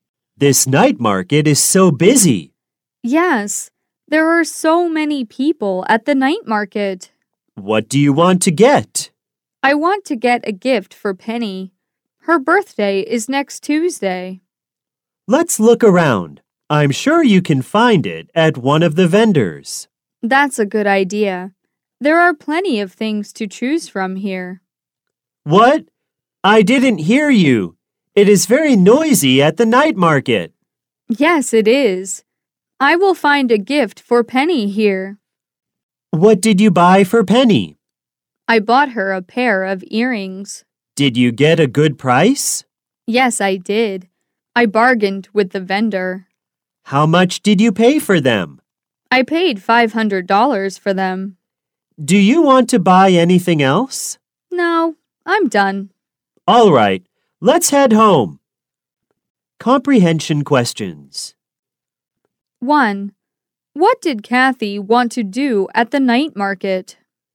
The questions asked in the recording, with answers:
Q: What did Kathy want to do at the night market?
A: She wanted to get a gift for Penny.